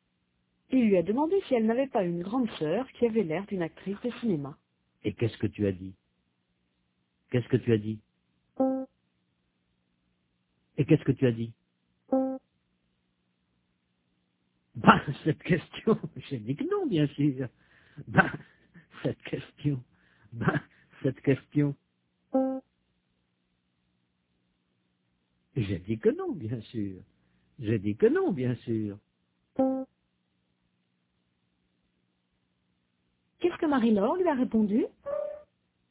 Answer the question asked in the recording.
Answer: Elle a dit que non.